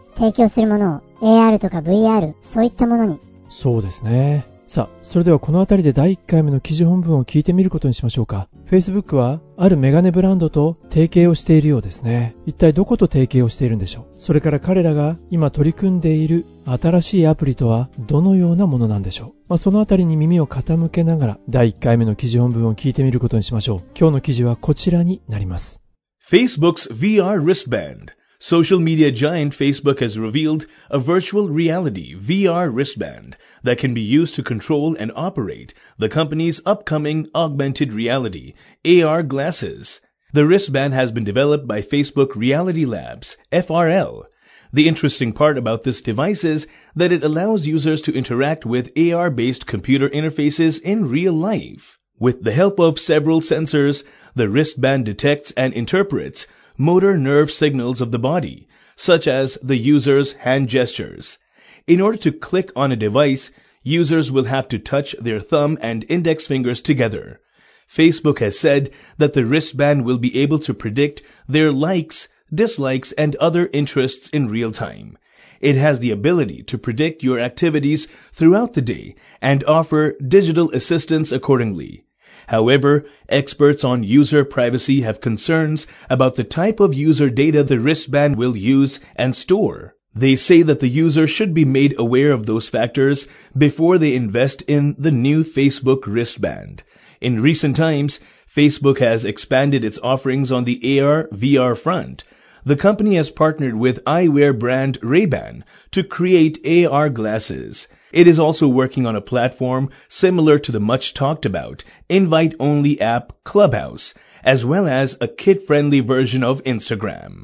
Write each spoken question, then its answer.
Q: 一体どこと提携をしているんでしょう。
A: 彼らがパートナーに選んだのは eyewear brand、メガネブランドのレイバンでした。

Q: それから彼らが今取り組んでいる新しいアプリとはどのようなものなんでしょう。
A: invite only の招待制のアプリ clubhouse それから